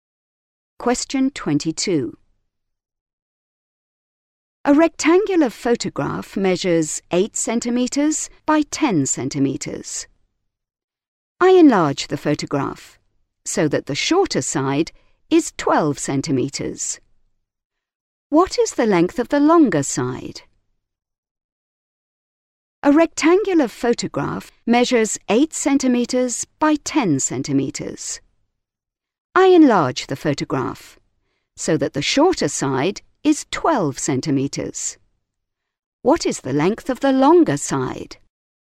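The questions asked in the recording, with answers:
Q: What is the length of the longer side?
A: 15 centimetres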